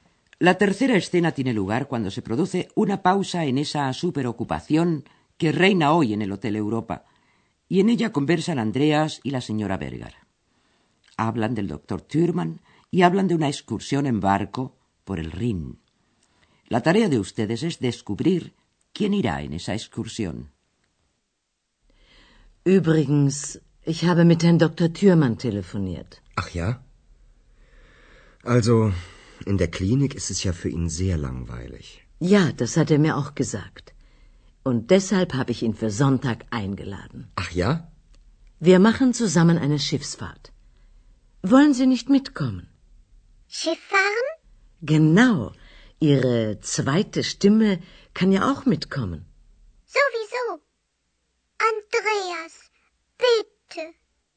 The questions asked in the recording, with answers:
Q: La tarea de ustedes es descubrir quién irá en esa excursión.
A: La señora Berger ha invitado al doctor Thürmann a una excursión en barco por el Rin.